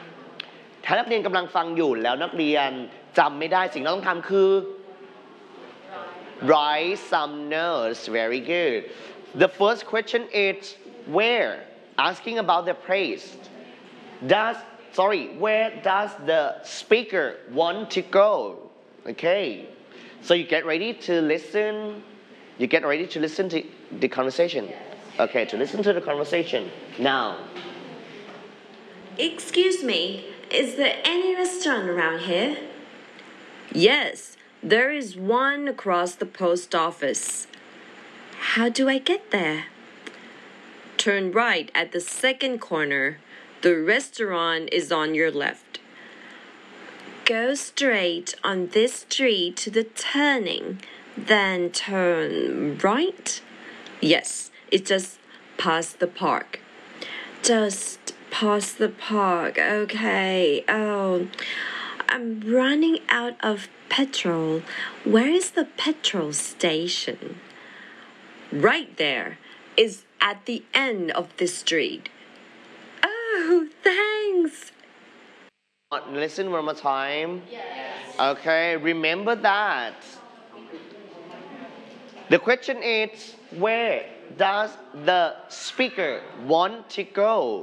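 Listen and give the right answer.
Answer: To a restaurant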